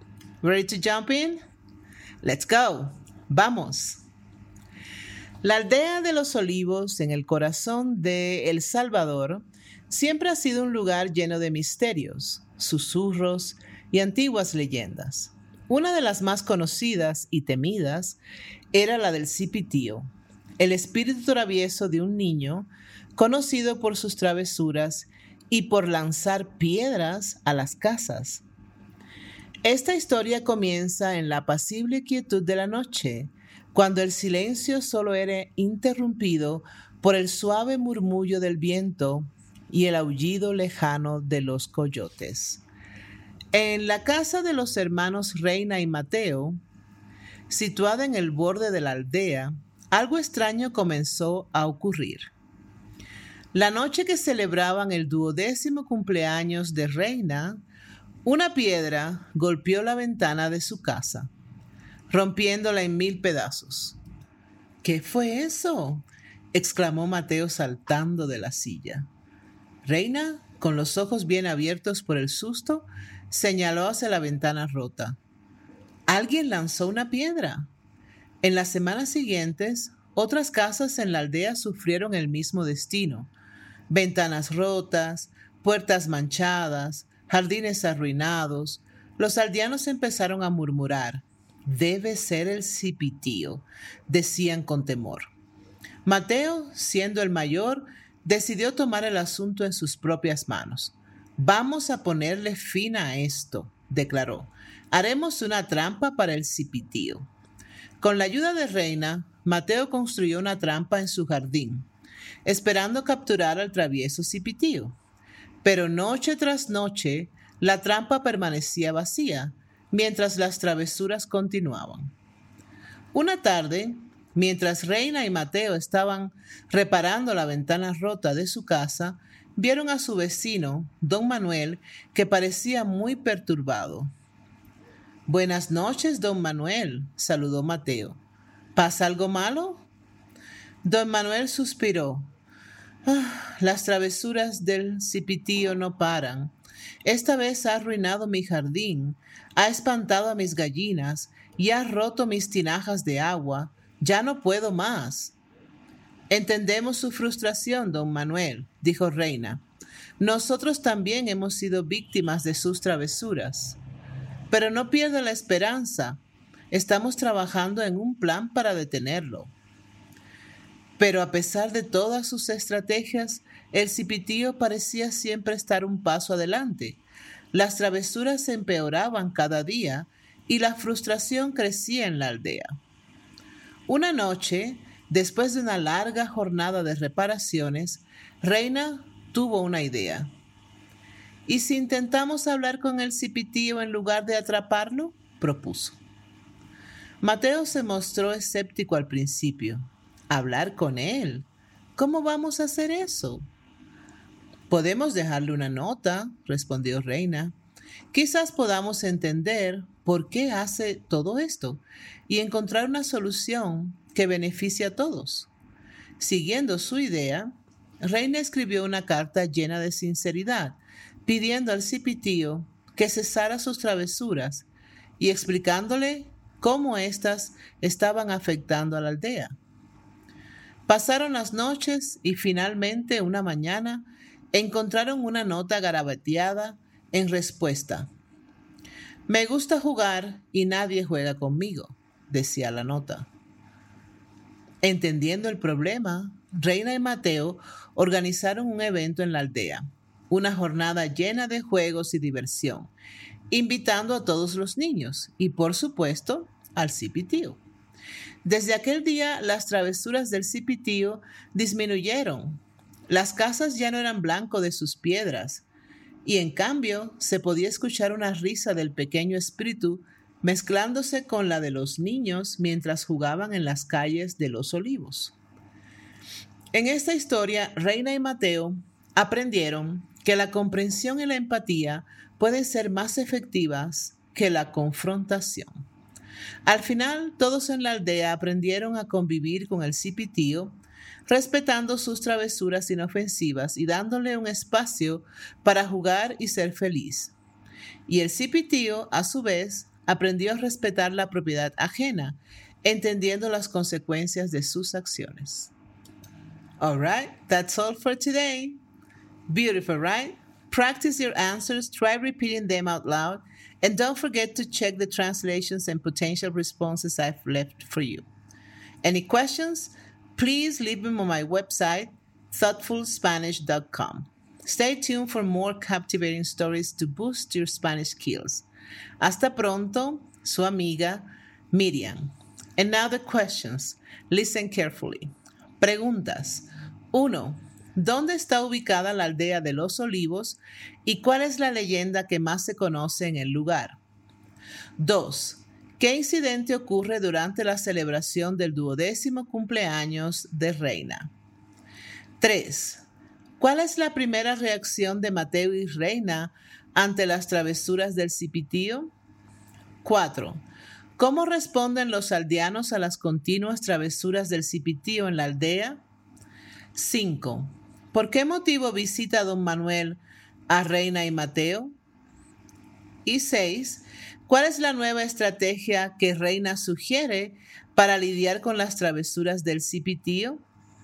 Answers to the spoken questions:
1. La aldea de los olivos está en El Salvador y la leyenda más conocida es la del Cipitío, un espíritu de un niño travieso que lanza piedras a las casas.
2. Durante la celebración del duodécimo cumpleaños de Reina, una piedra golpeó y rompió la ventana de su casa.
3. La primera reacción de Mateo y Reina fue intentar atrapar al Cipitío construyendo una trampa en su jardín.
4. Los aldeanos están asustados y frustrados con las continuas travesuras del cipitío en la aldea.
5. Don Manuel visita a Reina y Mateo porque las travesuras del cipitío han arruinado su jardín, espantado a sus gallinas y roto sus tinajas de agua.
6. Reina sugiere que en lugar de intentar atrapar al cipitío, deberían intentar comunicarse con él dejándole una nota.